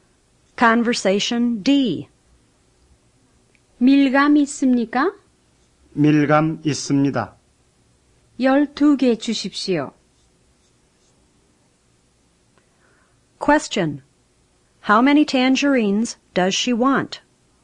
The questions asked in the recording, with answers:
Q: How many tangerines does she want?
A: 12.